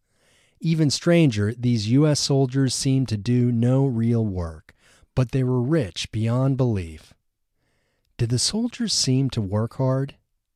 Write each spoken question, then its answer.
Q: Did the soldiers seem to work hard?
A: No, they didn't seem to work hard.